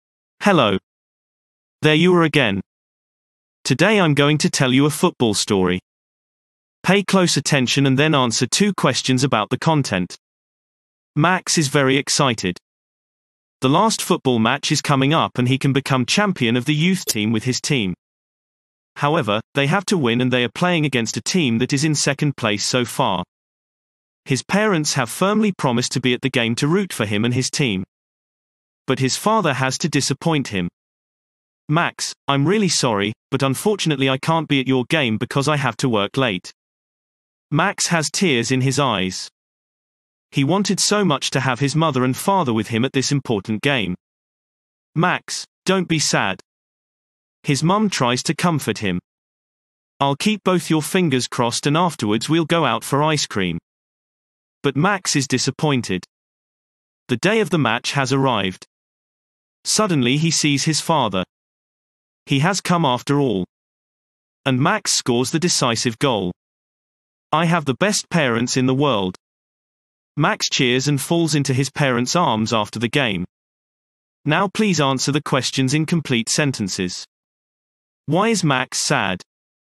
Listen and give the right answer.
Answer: Max is sad because his father can't come to his football match.